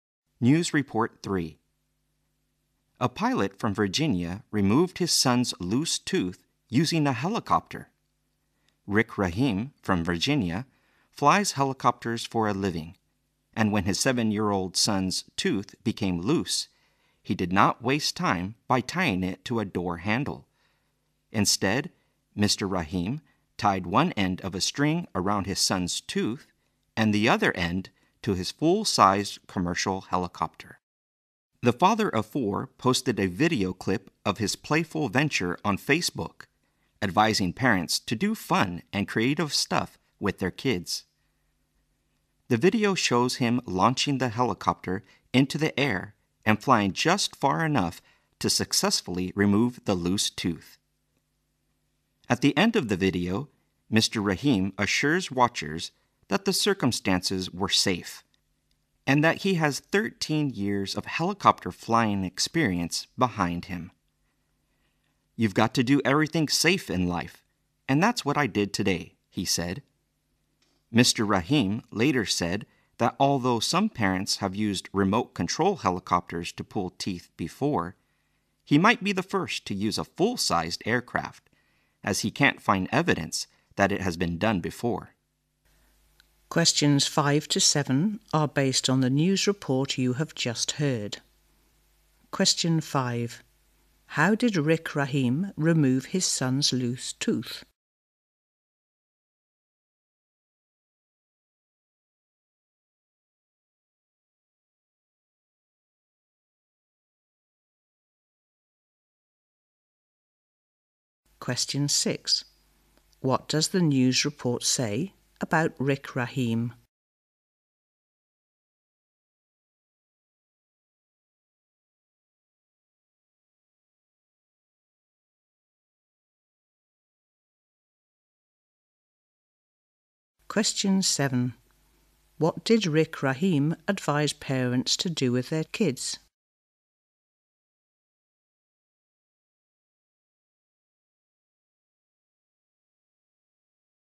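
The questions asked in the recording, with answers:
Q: How did Rick Rahim remove his son's loose tooth?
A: He tied it with a string to his helicopter and flew it

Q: What did Rick Rahim advise parents to do with their kids?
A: Do fun and creative stuff with them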